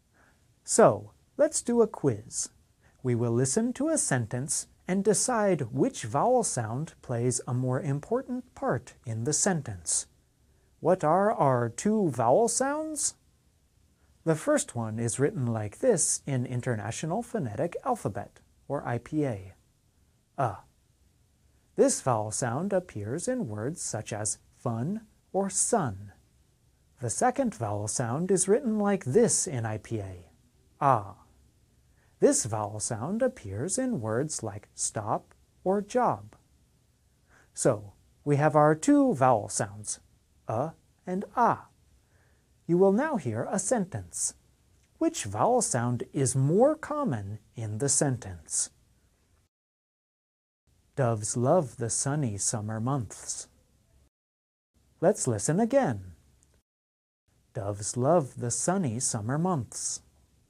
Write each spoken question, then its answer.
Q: Which vowel sound is more common in the sentence?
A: The answer is this, This vowel sound appears many times in the sentence you heard.